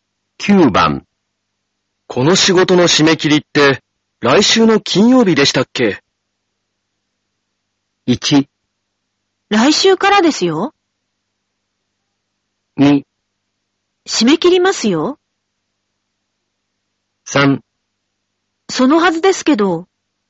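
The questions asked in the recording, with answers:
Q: この仕事の締め切りって、来週の金曜日でしたっけ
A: 3: そのはずですけど。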